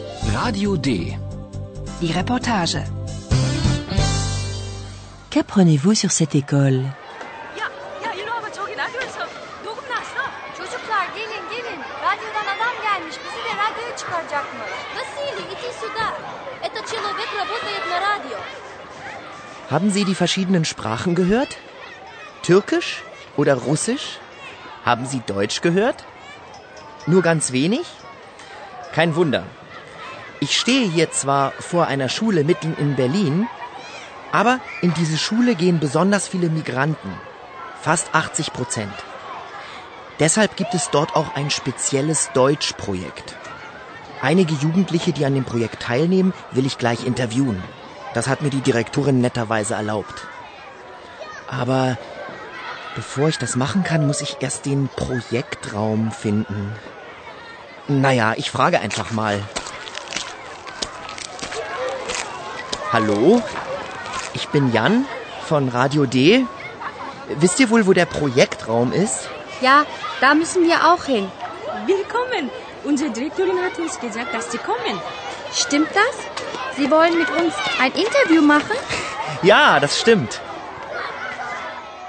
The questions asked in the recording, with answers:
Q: Qu'apprenez-vous sur cette école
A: Dans l'école que visite Yann, il y a de nombreux élèves immigrés, migranten,